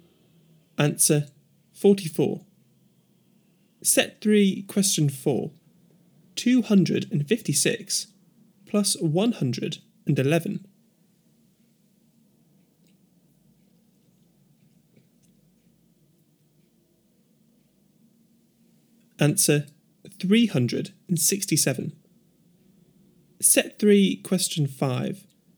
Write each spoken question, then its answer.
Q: 256 plus 111.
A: Answer 367.